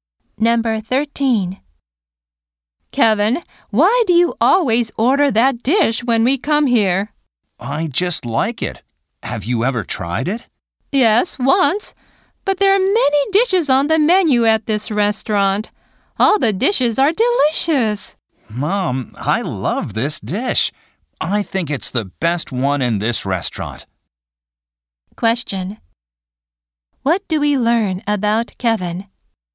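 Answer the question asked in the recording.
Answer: He always orders the same dish, which he thinks is the best one at the restaurant.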